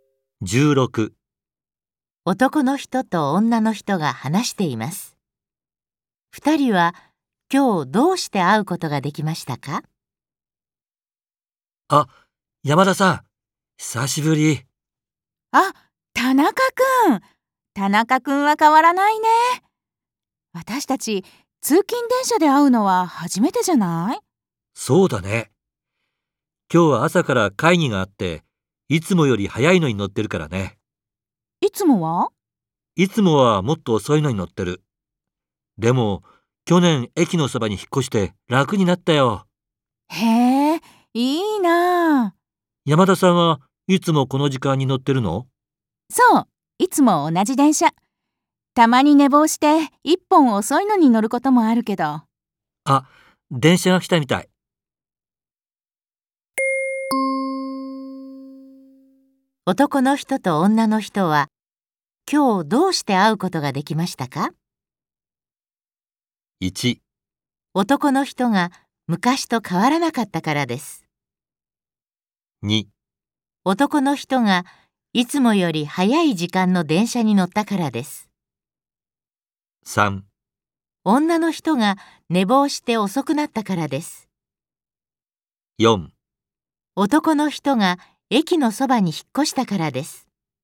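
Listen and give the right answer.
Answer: 2: 男の人がいつもより早い時間の電車に乗ったからです。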